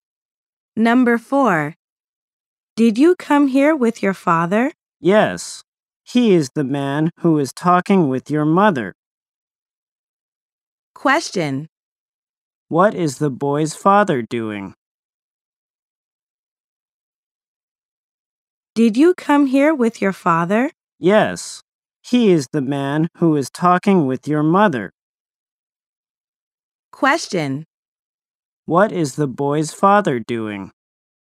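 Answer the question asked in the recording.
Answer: Talking with the other person's mother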